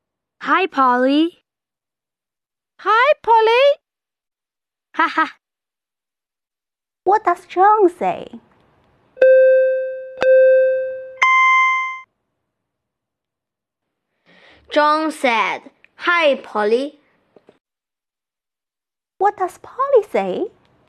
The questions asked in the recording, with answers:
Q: What does Polly say?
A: Polly said, Hi, Polly.